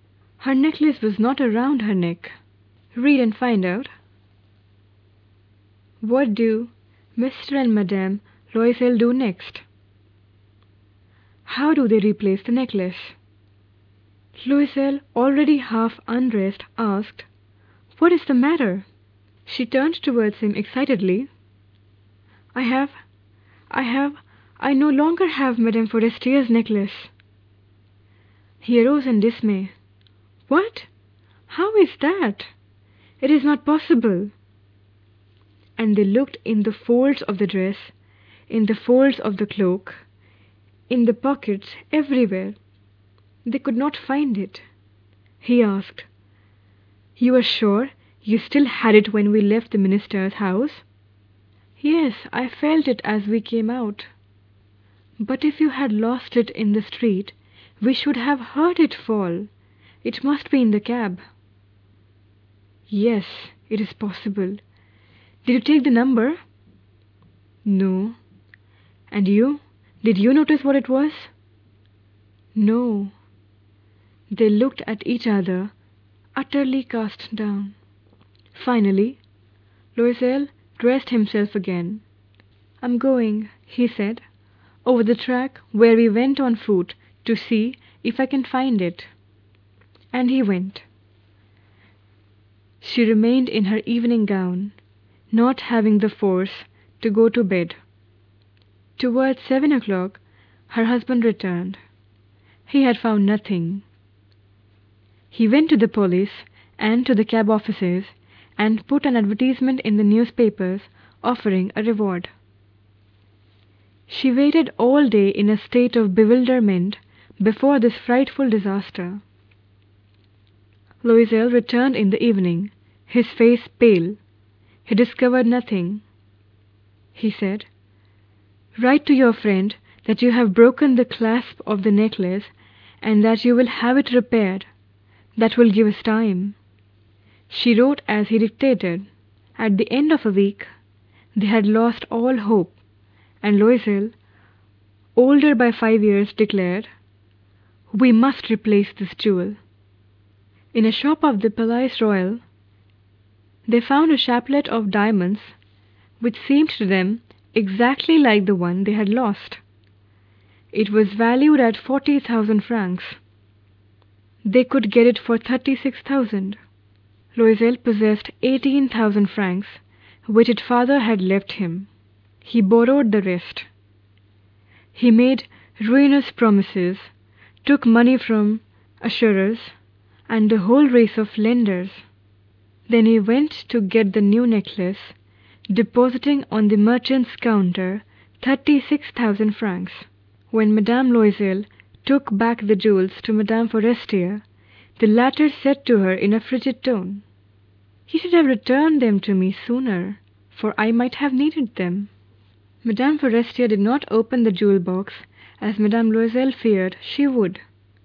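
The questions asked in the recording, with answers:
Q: What do Mr.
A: They search everywhere, and he goes to the police and the cab offices and puts an advertisement in the newspapers

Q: How do they replace the necklace?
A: They buy a similar diamond necklace for 36,000 francs, using his father's 18,000 francs and borrowing the rest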